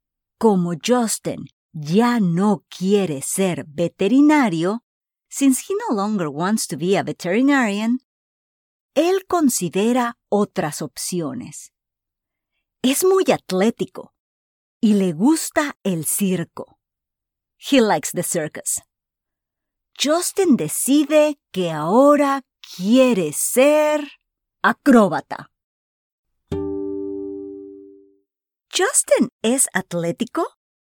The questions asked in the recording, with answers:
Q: ¿Justin es atlético?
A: Sí, Justin es atlético y le gusta el circo.